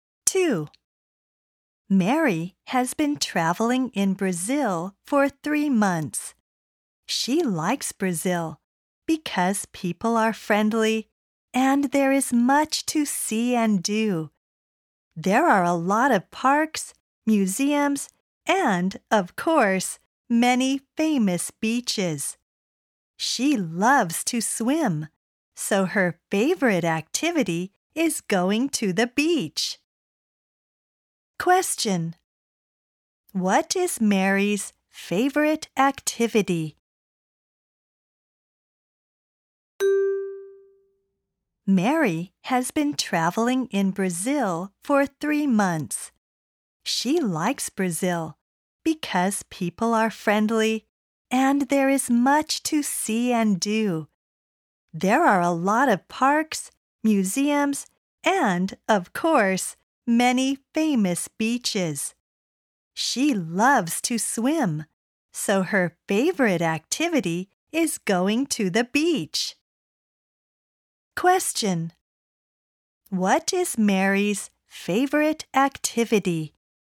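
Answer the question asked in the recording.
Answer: Going to the beach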